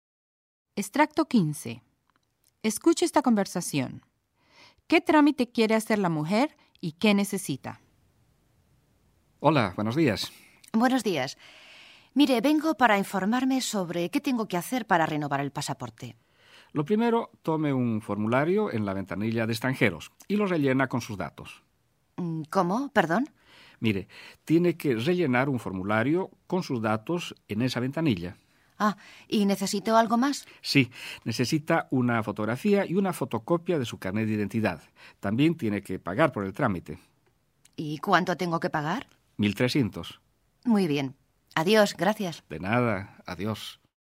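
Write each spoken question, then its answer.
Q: ¿Qué trámite quiere hacer la mujer y qué necesita?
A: Renovar el pasaporte; necesita rellenar un formulario, una fotografía, una fotocopia del carnet de identidad y pagar 1.300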